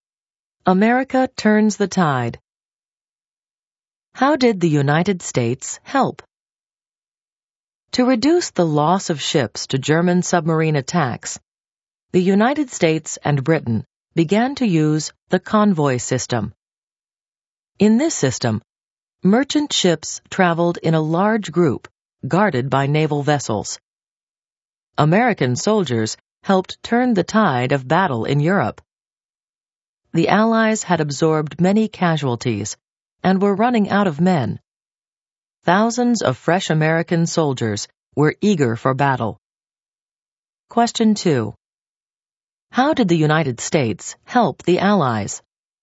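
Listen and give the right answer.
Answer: It used the convoy system against submarines and sent thousands of fresh soldiers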